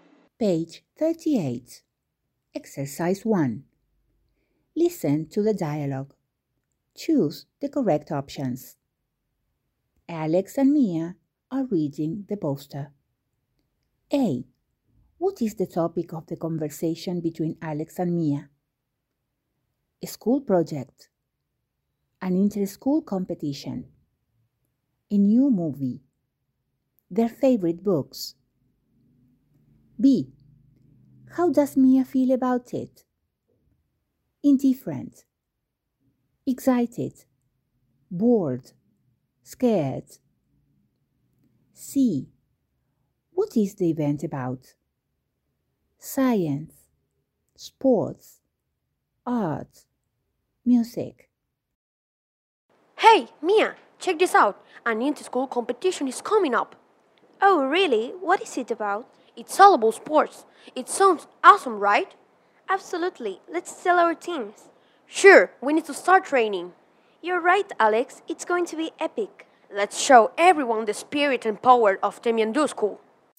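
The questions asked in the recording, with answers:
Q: What is the topic of the conversation between Alex and Mia?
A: An inter-school competition

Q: How does Mia feel about it?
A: Excited

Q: What is the event about?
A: Sports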